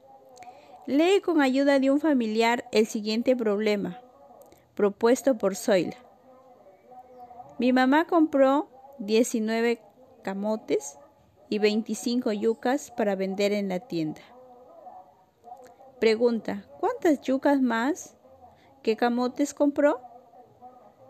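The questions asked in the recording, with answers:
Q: ¿cuántas yucas más que camotes compró?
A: 6 yucas más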